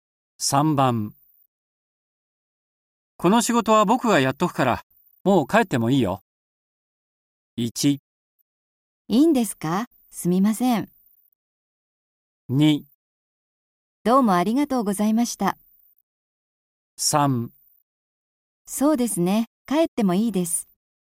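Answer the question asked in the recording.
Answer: 1: いいんですか?すみません。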